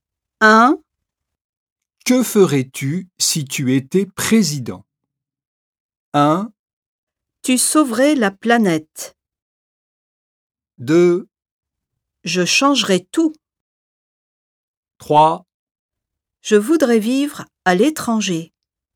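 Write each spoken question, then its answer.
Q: Que ferais-tu si tu étais président?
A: 2: Je changerais tout.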